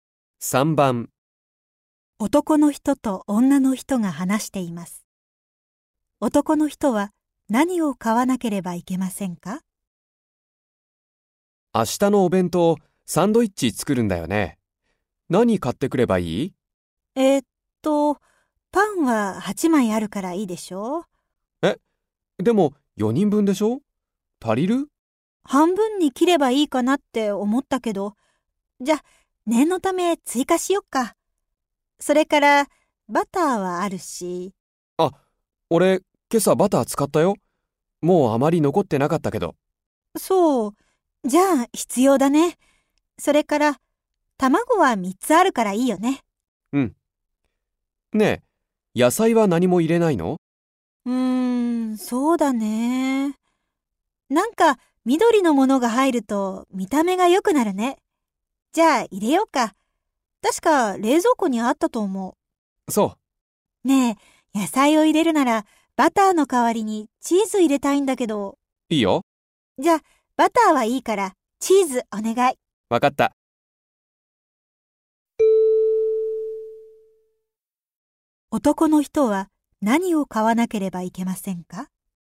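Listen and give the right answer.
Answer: パンとチーズ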